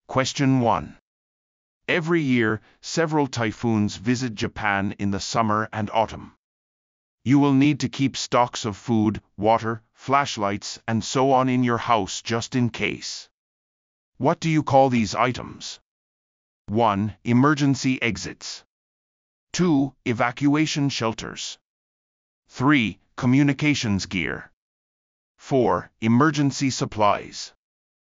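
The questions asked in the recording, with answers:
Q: What do you call these items?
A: 4: Emergency supplies.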